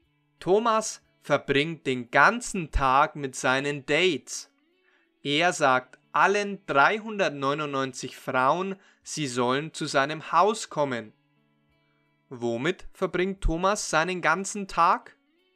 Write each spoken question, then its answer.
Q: Womit verbringt Thomas seinen ganzen Tag?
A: Mit Dates. Thomas verbringt seinen ganzen Tag mit Dates.